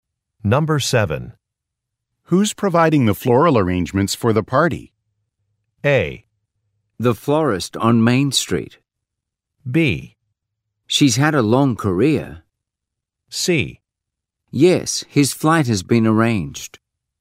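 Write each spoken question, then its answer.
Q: Who's providing the floral arrangements for the party?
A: A: The florist on Main Street.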